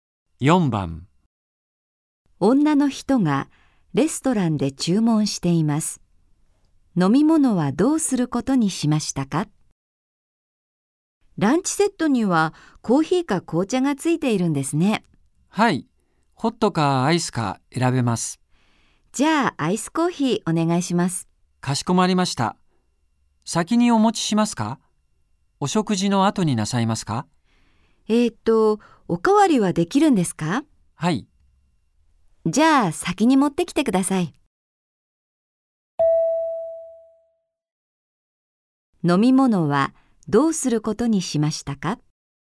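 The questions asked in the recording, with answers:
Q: 飲み物はどうすることにしましたか?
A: アイスコーヒーを食事の前に持ってきてもらう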